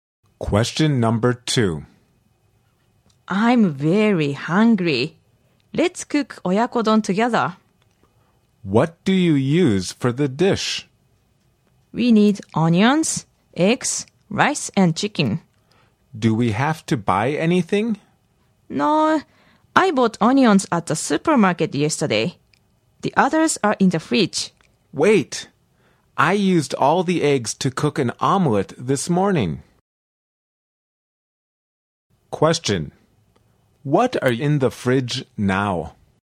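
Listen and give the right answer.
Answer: Rice and chicken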